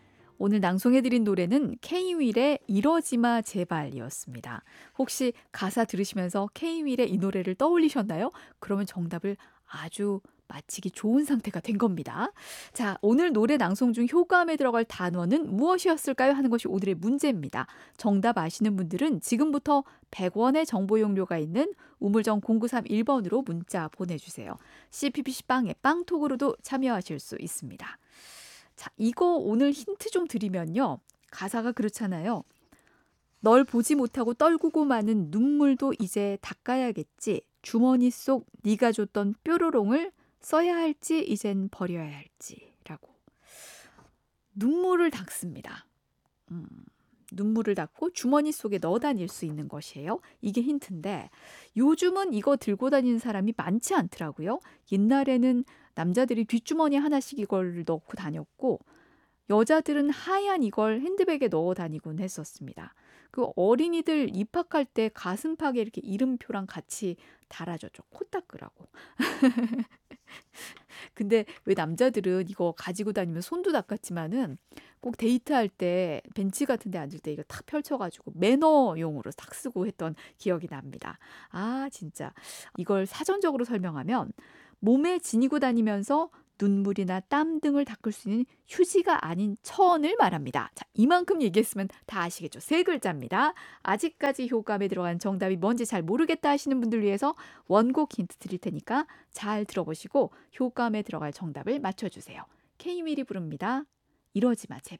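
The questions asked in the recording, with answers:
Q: 자, 오늘 노래 낭송 중 효과음에 들어갈 단어는 무엇이었을까요?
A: 손수건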